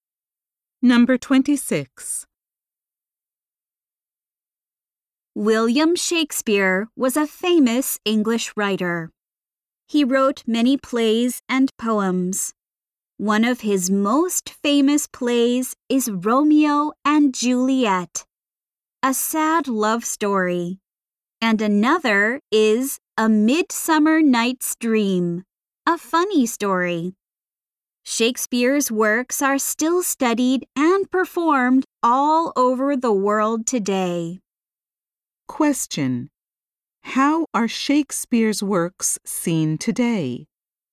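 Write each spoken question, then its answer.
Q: How are Shakespeare's works seen today?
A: They are still studied and performed all over the world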